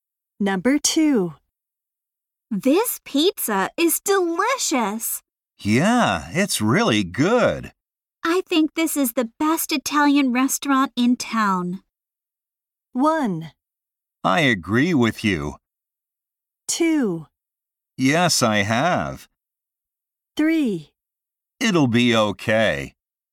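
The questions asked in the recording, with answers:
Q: I think this is the best Italian restaurant in town.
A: 1: I agree with you.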